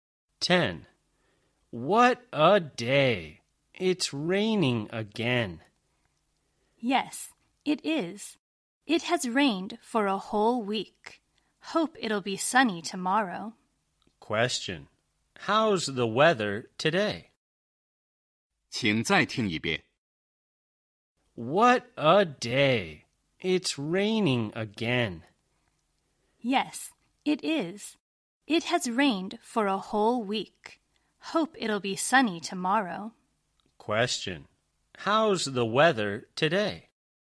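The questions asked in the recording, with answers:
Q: How's the weather today?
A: Rainy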